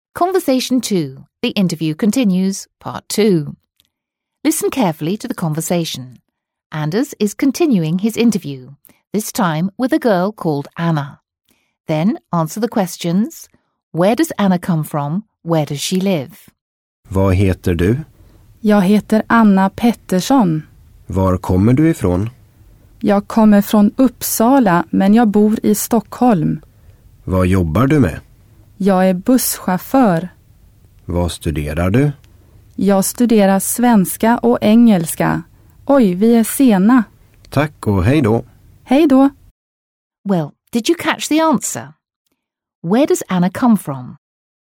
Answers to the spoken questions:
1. That's right, Anna comes from Uppsala.
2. Yes, she lives in Stockholm.